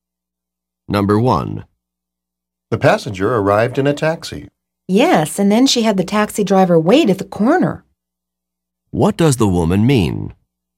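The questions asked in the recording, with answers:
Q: What does the woman mean?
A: The passenger told the taxi driver to wait at the corner.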